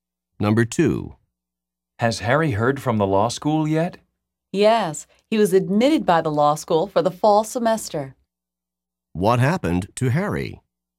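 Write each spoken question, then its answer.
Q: What happened to Harry?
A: He was admitted to law school for the fall semester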